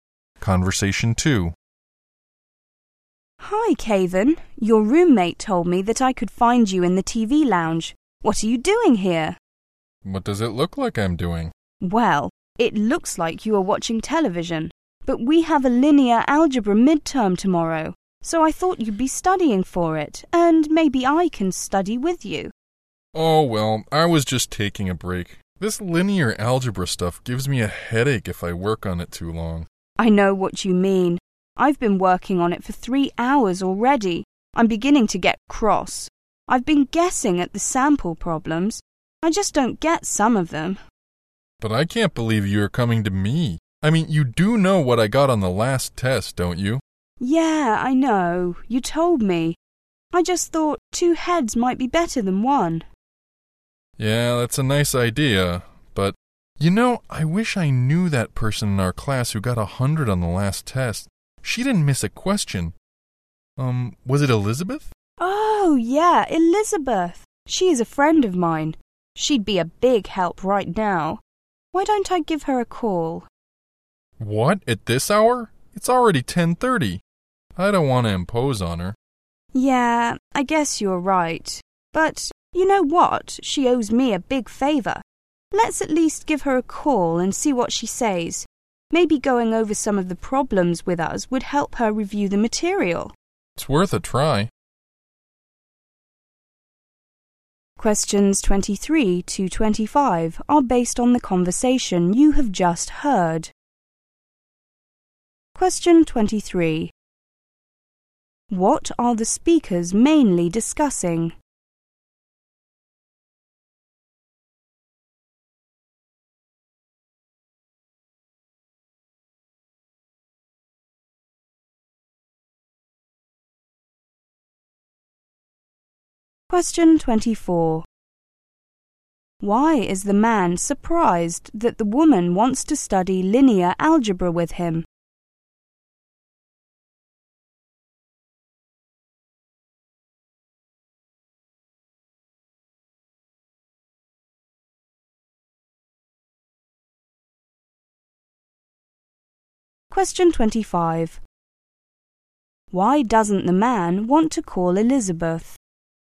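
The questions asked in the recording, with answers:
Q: What are the speakers mainly discussing?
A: Studying for tomorrow's linear algebra midterm

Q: Why is the man surprised that the woman wants to study linear algebra with him?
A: He did badly on the last test.

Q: Why doesn't the man want to call Elizabeth?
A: It's too late, 10:30, and he doesn't want to impose on her.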